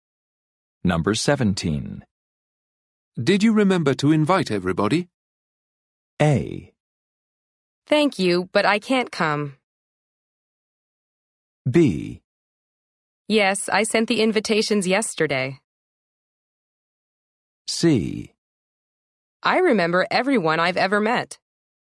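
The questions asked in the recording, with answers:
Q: Did you remember to invite everybody?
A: B: Yes, I sent the invitations yesterday.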